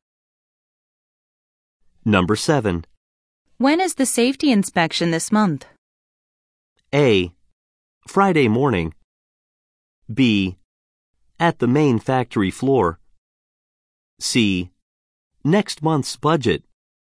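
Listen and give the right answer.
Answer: A: Friday morning.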